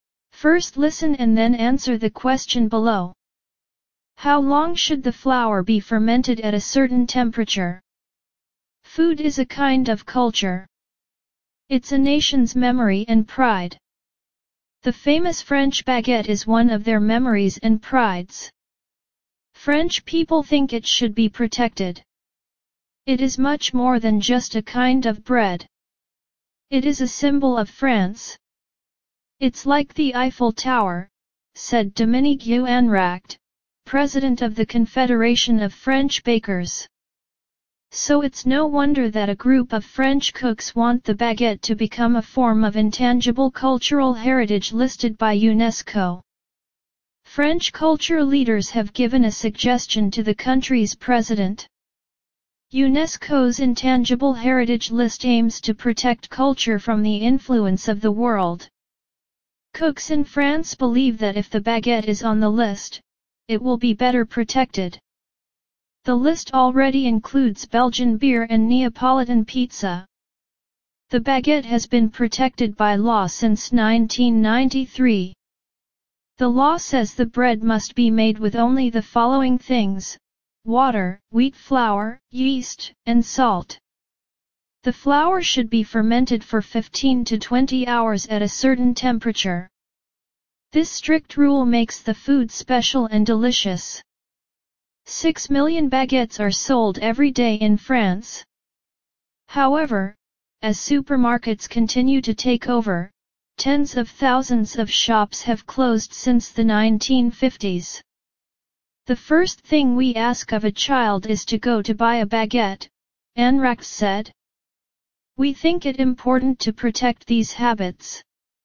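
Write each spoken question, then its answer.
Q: How long should the flour be fermented at a certain temperature?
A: 15 to 20 hours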